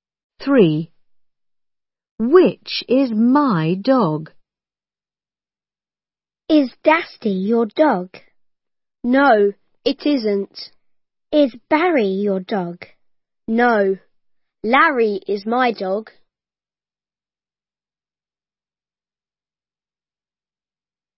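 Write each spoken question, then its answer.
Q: Which is my dog?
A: Larry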